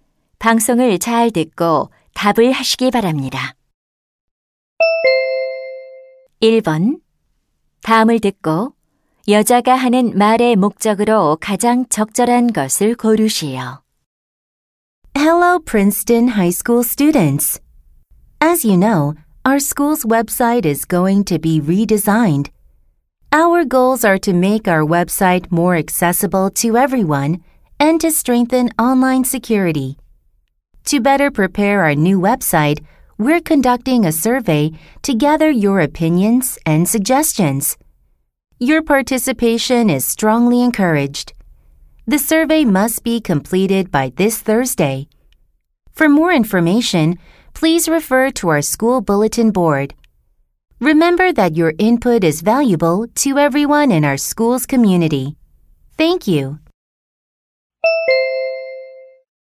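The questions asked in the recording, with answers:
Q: 다음을 듣고 여자가 하는 말의 목적으로 가장 적절한 것을 고르시오.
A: 학교 웹사이트 개편을 위한 설문 조사 참여를 독려하려고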